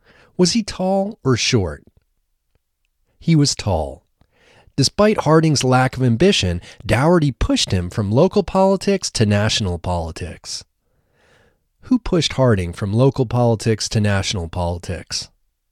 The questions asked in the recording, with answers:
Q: Who pushed Harding from local politics to national politics?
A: Dougherty pushed Harding from local politics to national politics.